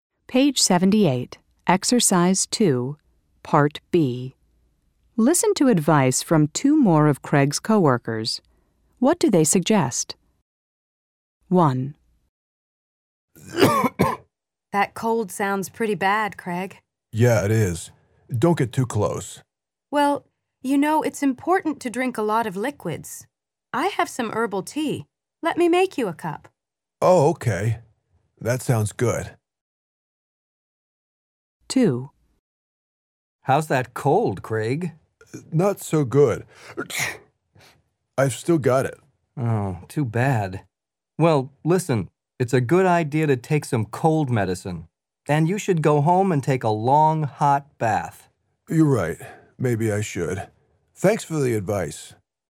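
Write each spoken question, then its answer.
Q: What do they suggest?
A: Drink a lot of liquids, such as herbal tea

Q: What do they suggest?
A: Take some cold medicine and go home and take a long, hot bath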